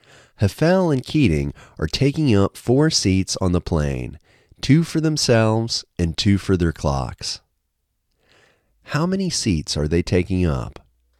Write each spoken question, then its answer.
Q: How many seats are they taking up?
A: They are taking up four seats.